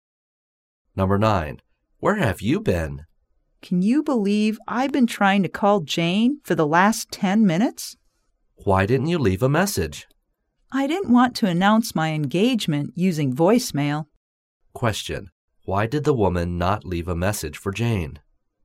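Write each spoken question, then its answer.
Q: Why did the woman not leave a message for Jane?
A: She didn't want to announce her engagement by voicemail.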